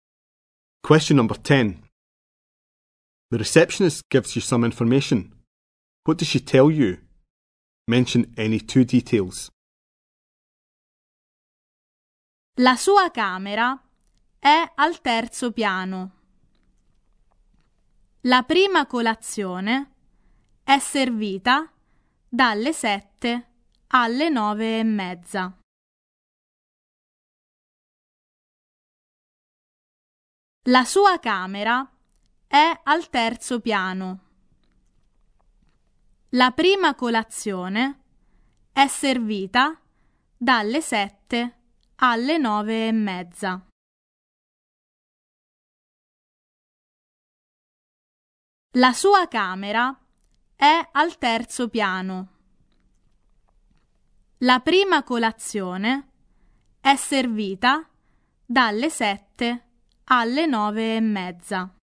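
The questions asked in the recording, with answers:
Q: What does she tell you? Mention any two details.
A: The room is on the third floor; breakfast is served from 7 to 9.30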